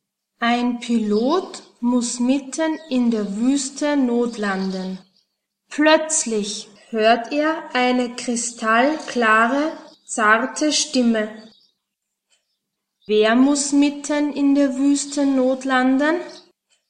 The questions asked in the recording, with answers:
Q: Wer muss mitten in der Wüste notlanden?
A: Ein Pilot. Ein Pilot muss mitten in der Wüste notlanden.